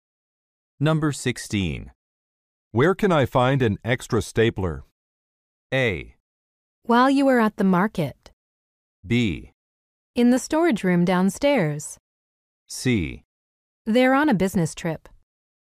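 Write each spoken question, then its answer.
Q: Where can I find an extra stapler?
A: B: In the storage room downstairs.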